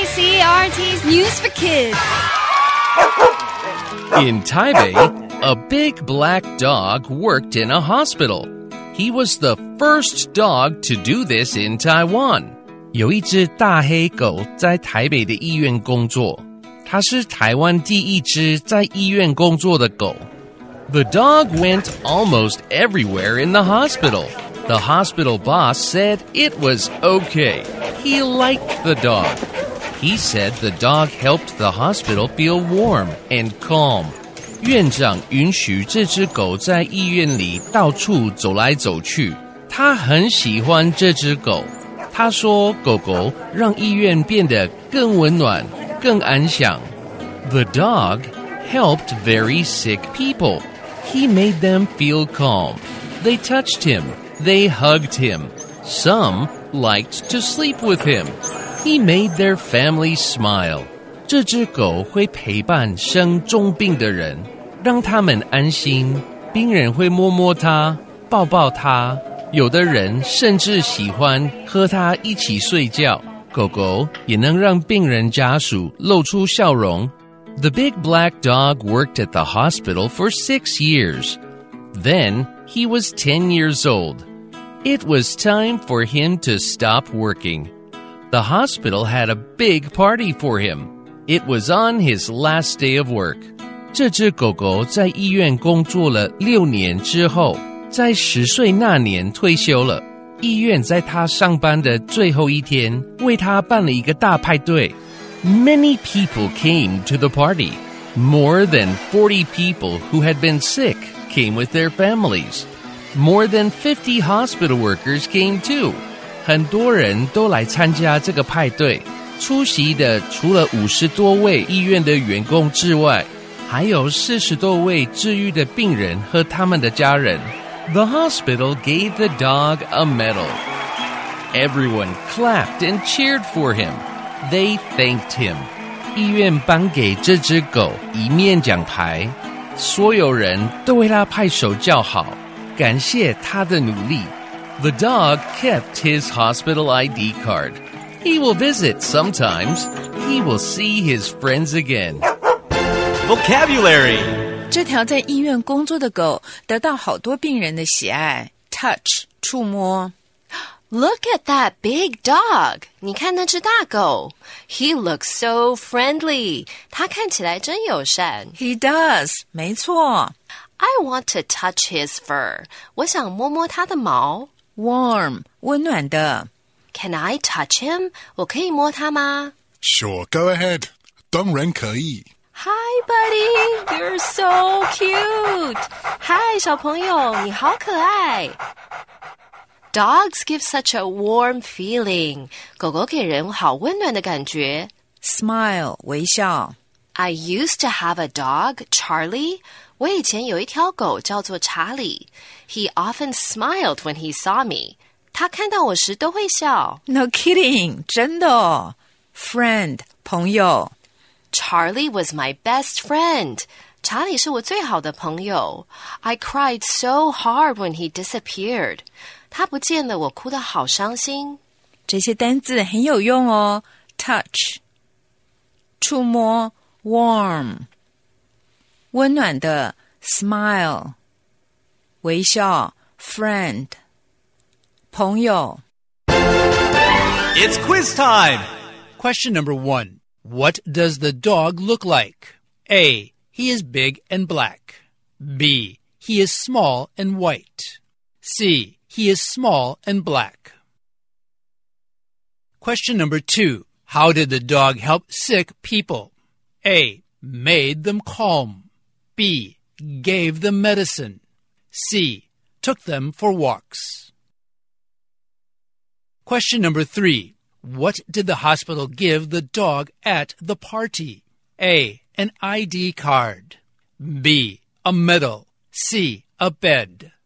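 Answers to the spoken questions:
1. A: He is big and black.
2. A: Made them calm.
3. B: A medal.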